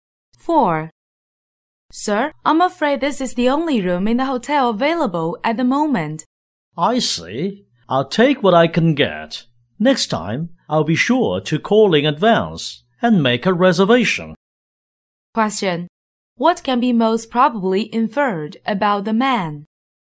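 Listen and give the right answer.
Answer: He didn't book a room in advance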